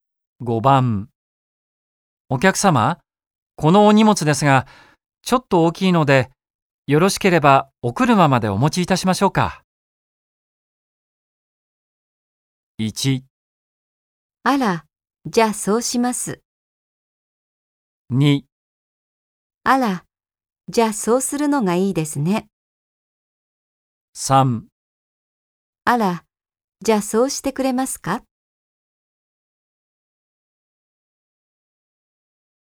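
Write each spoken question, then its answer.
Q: お客様、このお荷物ですが、ちょっと大きいので、よろしければお車までお持ちいたしましょうか。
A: 3: あら、じゃあそうしてくれますか?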